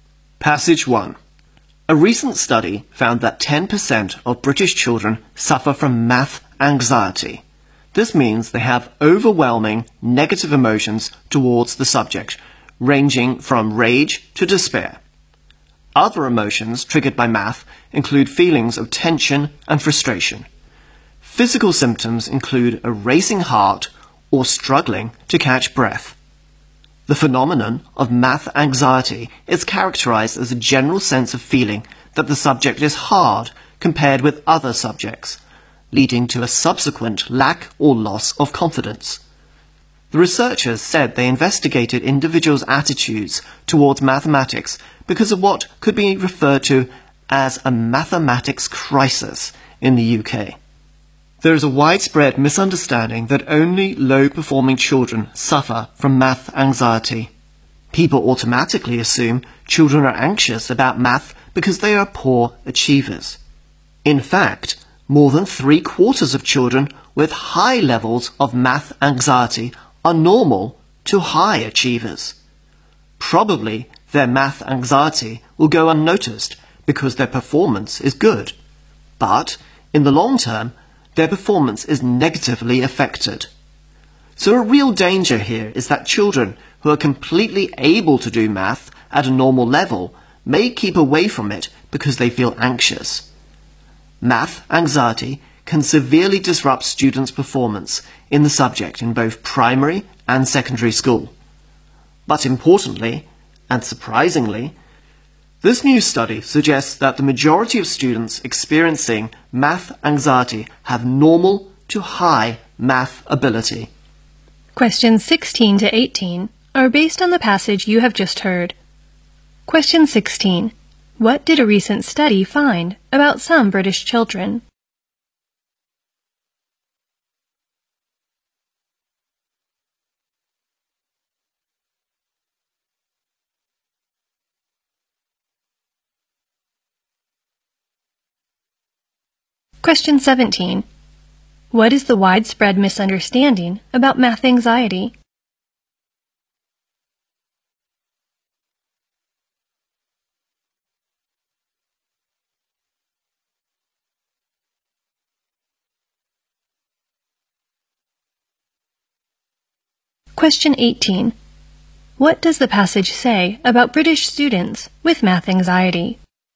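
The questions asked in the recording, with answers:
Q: What did a recent study find about some British children?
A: 10% suffer from math anxiety

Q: What is the widespread misunderstanding about math anxiety?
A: That only low-performing children suffer from it

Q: What does the passage say about British students with math anxiety?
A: Most of them have normal to high math ability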